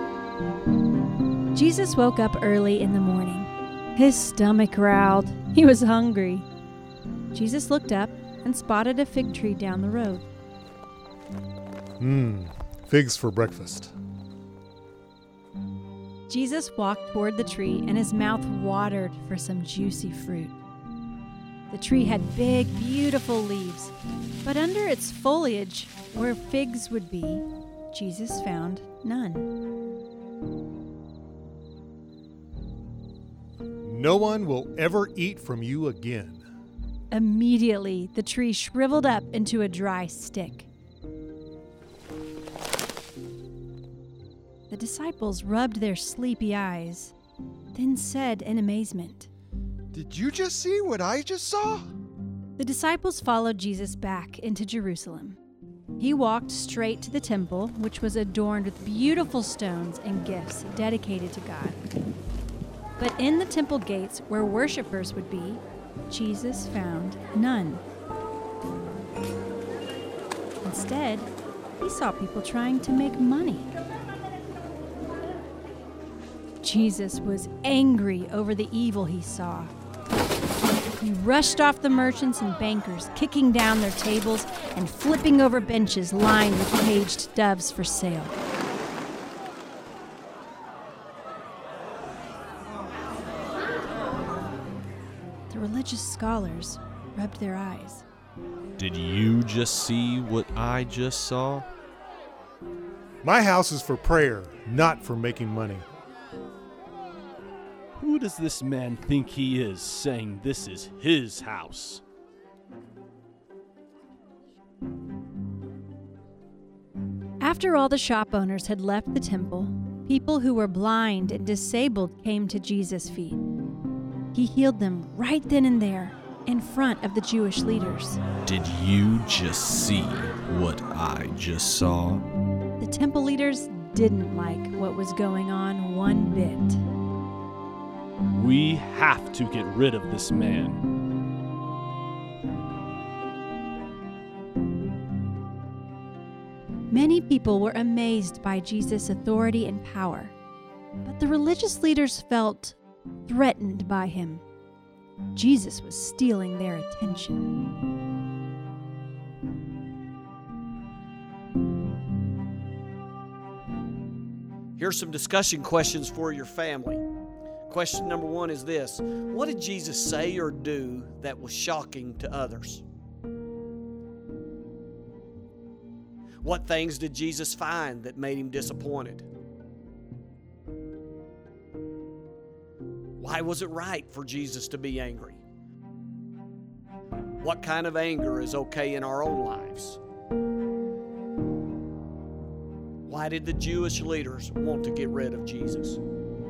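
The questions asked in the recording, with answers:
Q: What things did Jesus find that made him disappointed?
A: A fig tree with no fruit, and people trying to make money in the temple

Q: Why did the Jewish leaders want to get rid of Jesus?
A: They felt threatened by him; he was stealing their attention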